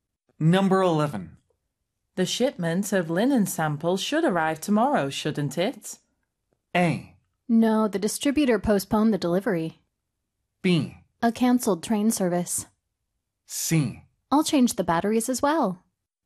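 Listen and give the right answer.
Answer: A: No, the distributor postponed the delivery.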